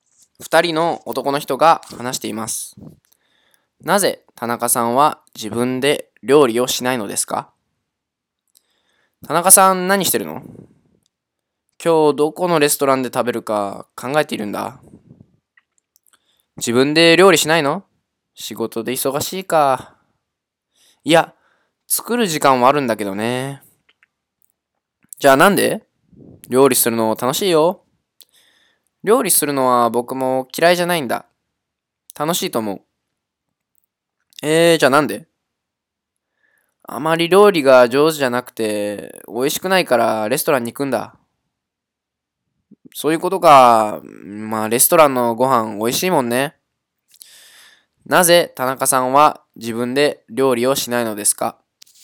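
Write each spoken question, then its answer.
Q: なぜ田中さんは自分で料理をしないのですか?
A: 料理があまり上手じゃなくて、美味しくないから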